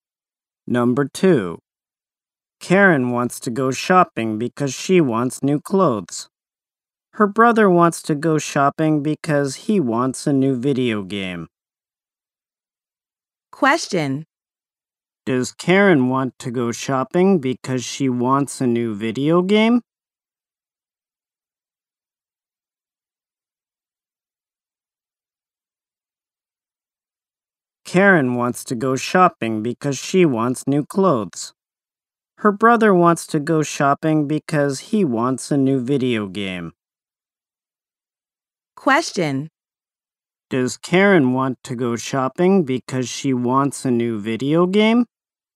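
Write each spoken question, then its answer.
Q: Does Karen want to go shopping because she wants a new video game?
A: No, she wants new clothes.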